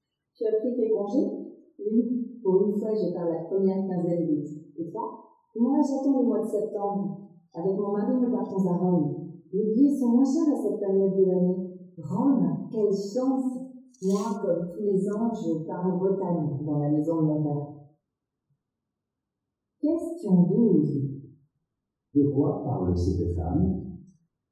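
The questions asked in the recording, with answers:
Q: De quoi parle cette femme?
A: De ses vacances (congés)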